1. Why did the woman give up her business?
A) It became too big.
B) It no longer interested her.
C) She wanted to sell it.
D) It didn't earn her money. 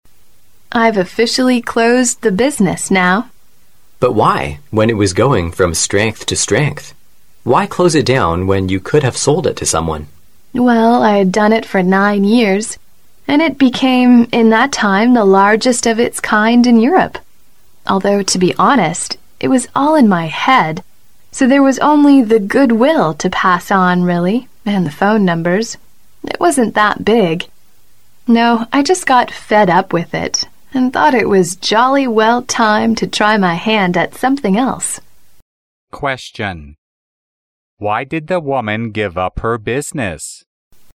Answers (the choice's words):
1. It no longer interested her.

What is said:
W: I've officially closed the business now.
M: But why? When it is going from strength to strength! Why closed it down when you could have sold it to someone?
W: Well, I've done it for 9 years and it became in that time the largest of its kind in Europe, although, to be honest, it was all in my head, so there is only the good will to pass on really and phone numbers. It wasn't that big. Now I just got fed up with it and thought it was jolly well time to try my hand at something else.
Question: Why did the woman give up her business?